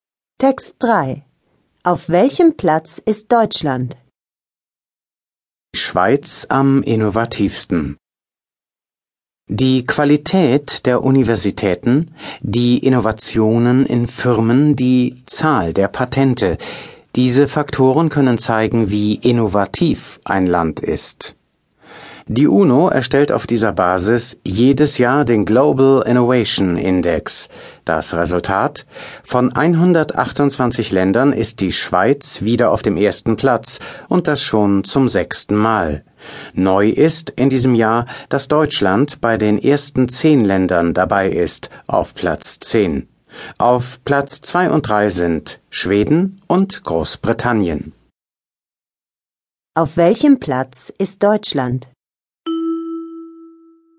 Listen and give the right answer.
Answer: Auf Platz 10.